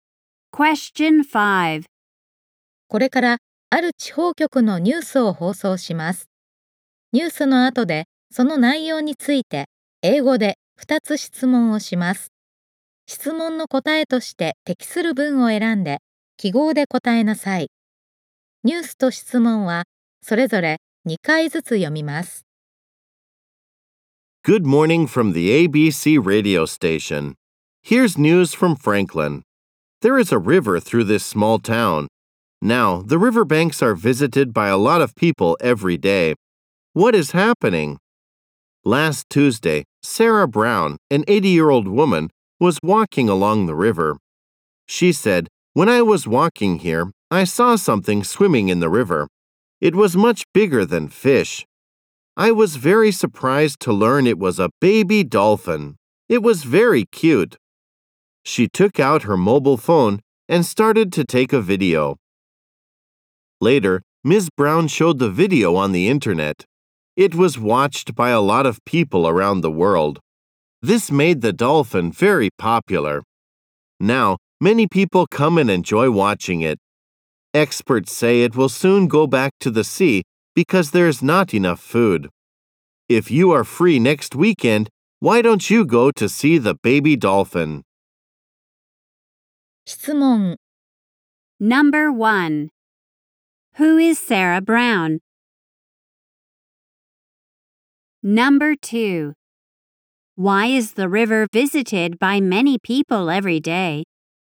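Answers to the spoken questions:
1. An 80-year-old woman who saw a baby dolphin in the river and posted a video of it.
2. Because people come to watch a baby dolphin that became popular from Ms. Brown's video.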